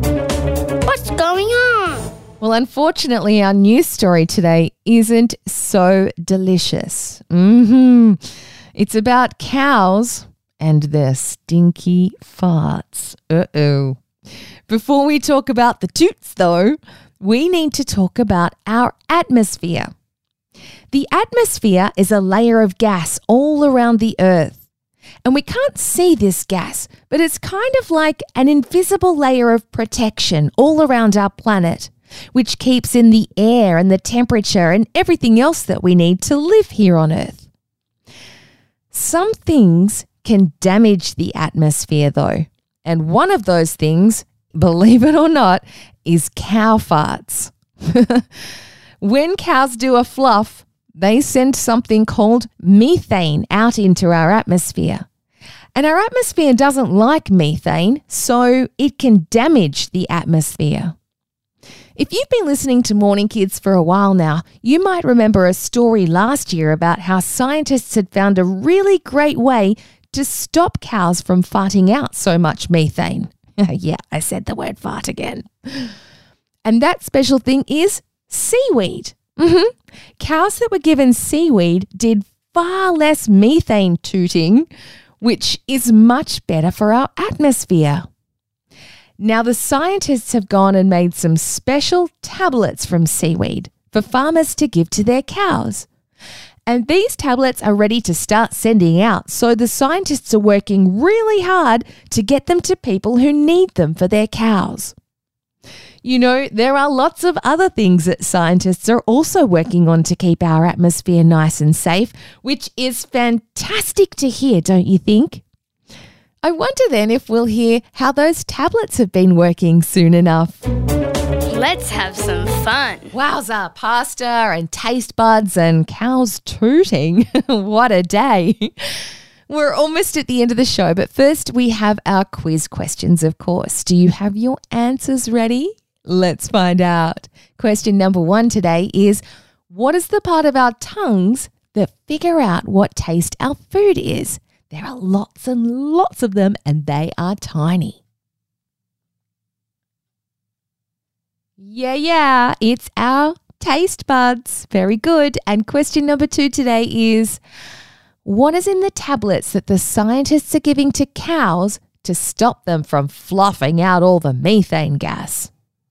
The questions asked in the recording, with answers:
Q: what is in the tablets that the scientists are giving to cows to stop them from fluffing out all the methane gas?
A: I heard that most of you answered seaweed.